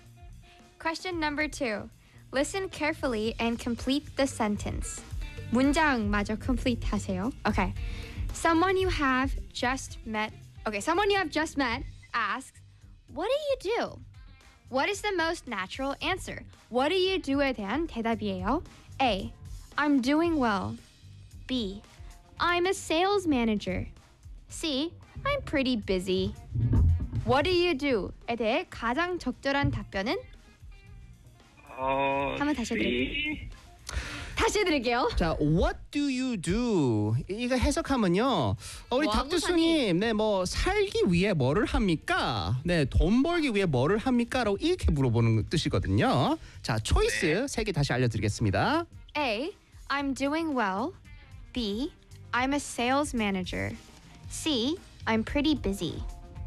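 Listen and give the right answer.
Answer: B: I'm a sales manager.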